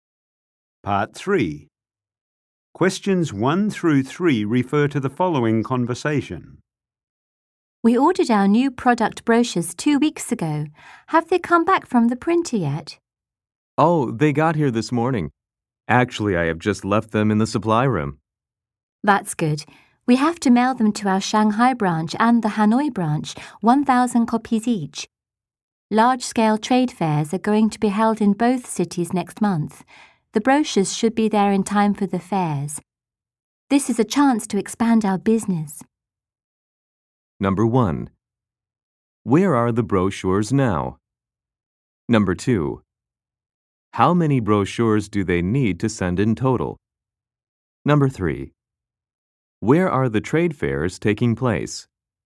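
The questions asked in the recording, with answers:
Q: Where are the brochures now?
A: In the supply room

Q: How many brochures do they need to send in total?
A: 2,000

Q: Where are the trade fairs taking place?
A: Shanghai and Hanoi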